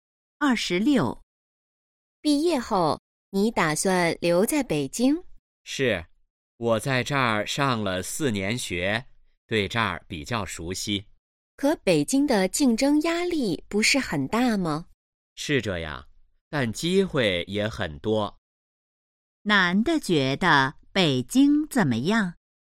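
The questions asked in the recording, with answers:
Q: 男的觉得北京怎么样?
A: 机会很多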